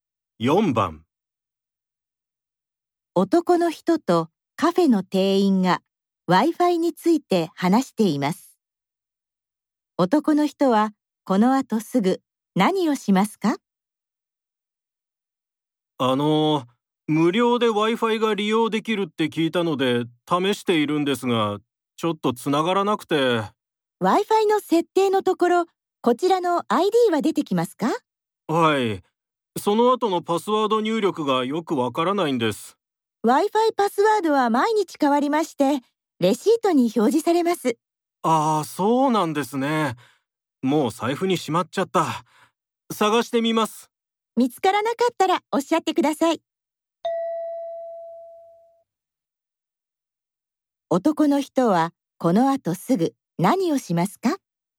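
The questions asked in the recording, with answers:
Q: 男の人はこの後すぐ何をしますか?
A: 財布にしまったレシートを探す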